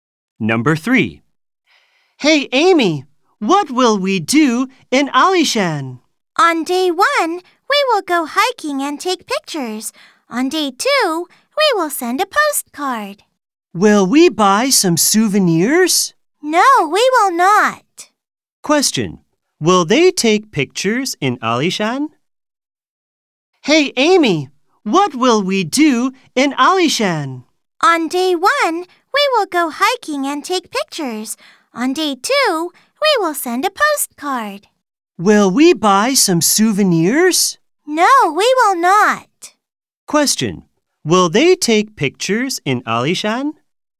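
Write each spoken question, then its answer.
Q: Will they take pictures in Alishan?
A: Yes, they will.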